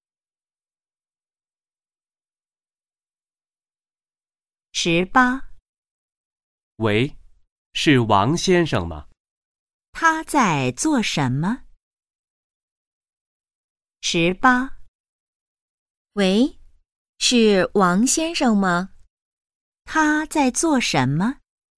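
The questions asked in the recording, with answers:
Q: 他在做什么?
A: 打电话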